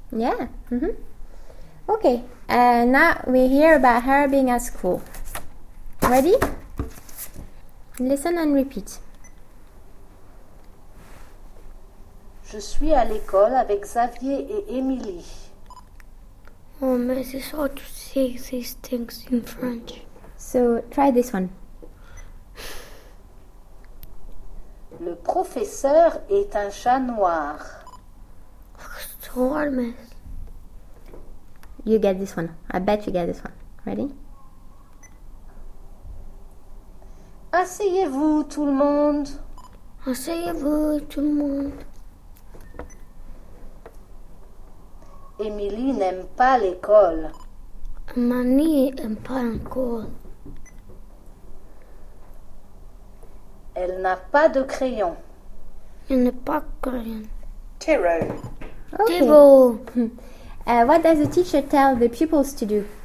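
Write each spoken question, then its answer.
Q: What does the teacher tell the pupils to do?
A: Sit down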